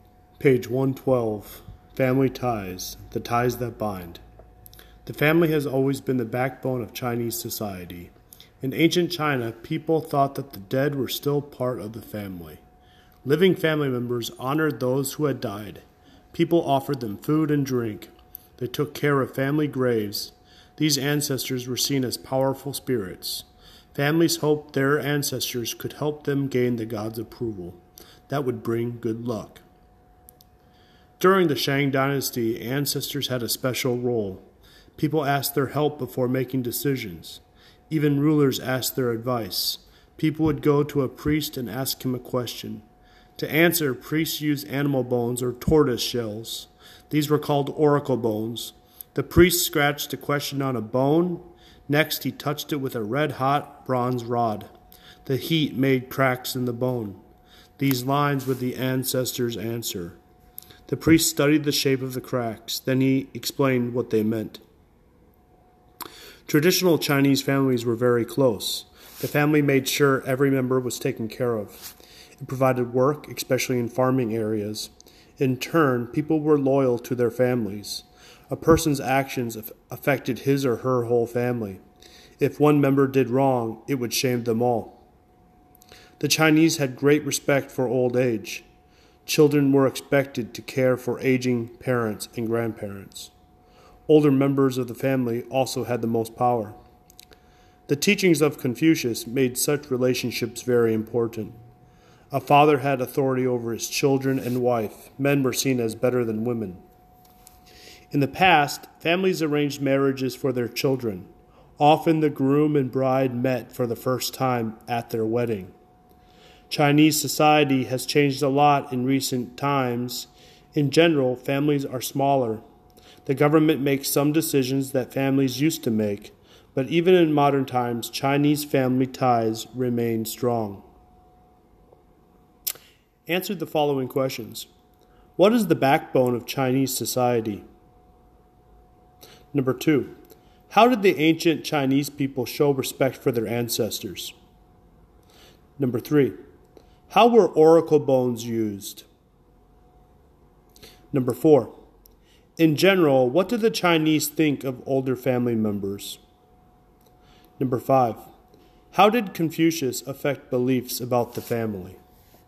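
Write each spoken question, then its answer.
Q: What is the backbone of Chinese society?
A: The family

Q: How did the ancient Chinese people show respect for their ancestors?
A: They offered them food and drink and took care of family graves

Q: How were oracle bones used?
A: A priest scratched a question on a bone, touched it with a red-hot bronze rod, and read the cracks as the ancestor's answer

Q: In general, what did the Chinese think of older family members?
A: They had great respect for them; older members had the most power

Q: How did Confucius affect beliefs about the family?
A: His teachings made family relationships very important, with fathers having authority over children and wives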